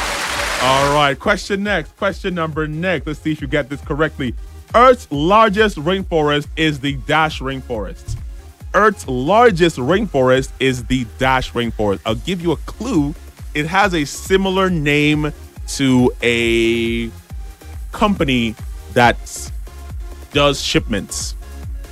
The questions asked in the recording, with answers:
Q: Earth's largest rainforest is the Dash Rainforest.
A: The answer was the Amazon Rainforest.